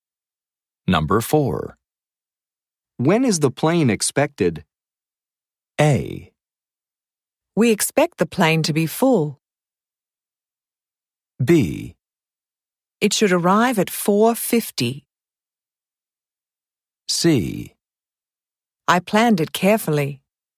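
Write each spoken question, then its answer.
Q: When is the plane expected?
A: B: It should arrive at 4:50.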